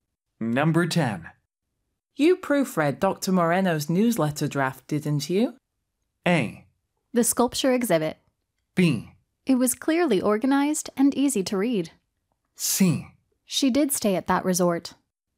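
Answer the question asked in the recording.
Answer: B: It was clearly organized and easy to read.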